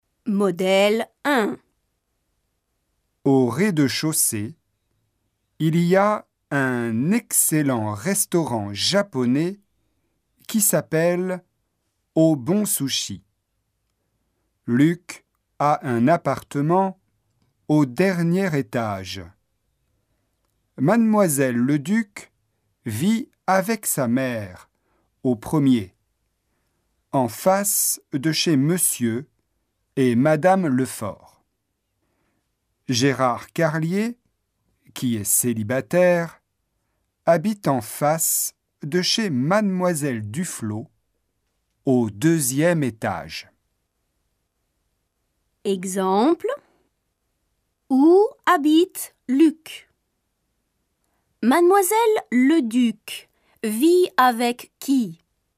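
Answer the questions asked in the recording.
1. Au dernier étage
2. Avec sa mère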